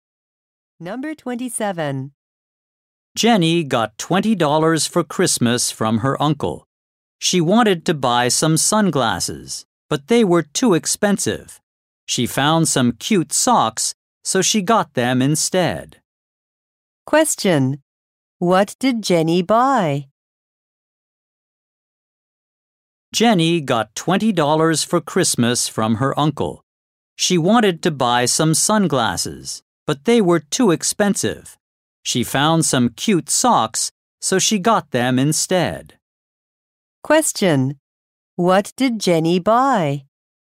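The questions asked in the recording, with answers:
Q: What did Jenny buy?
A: Some socks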